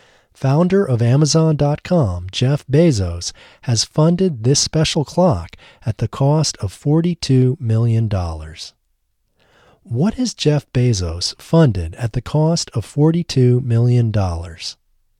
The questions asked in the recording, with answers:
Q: What has Jeff Bezos funded at the cost of $42 million?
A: Jeff Bezos has funded this special clock at the cost of $42 million.